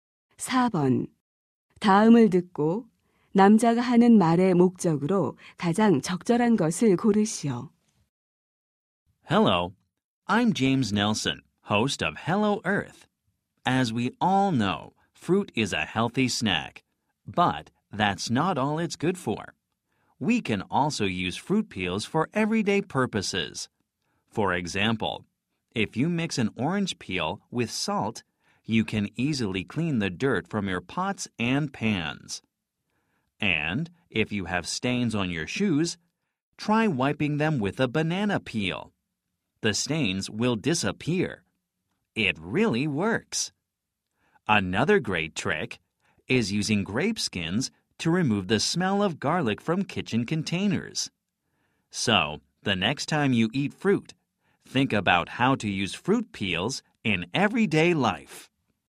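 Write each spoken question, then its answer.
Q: 다음을 듣고 남자가 하는 말의 목적으로 가장 적절한 것을 고르시오.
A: 과일 껍질을 일상생활에 활용하는 방법을 소개하려고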